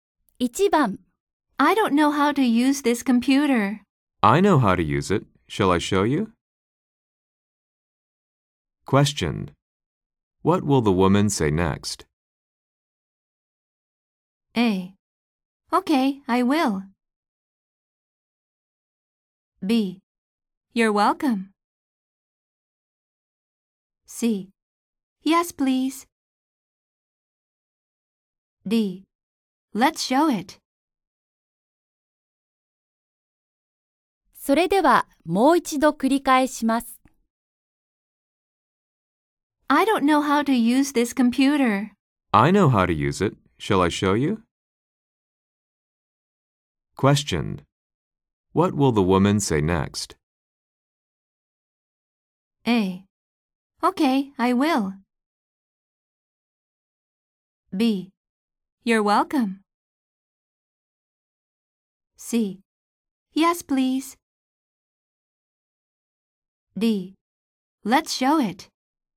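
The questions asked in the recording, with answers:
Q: What will the woman say next?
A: C: Yes, please.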